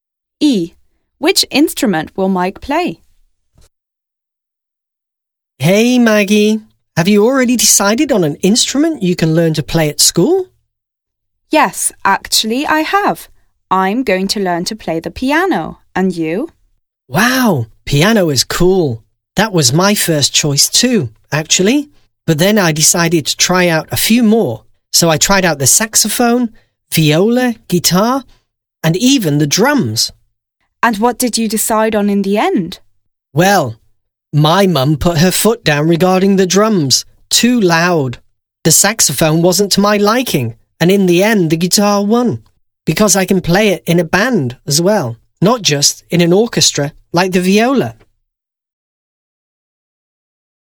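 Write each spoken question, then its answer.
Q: Which instrument will Mike play?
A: The guitar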